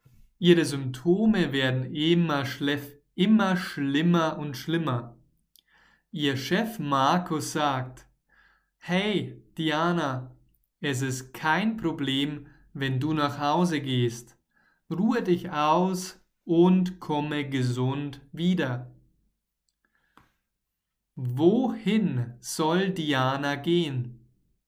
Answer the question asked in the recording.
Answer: nach Hause.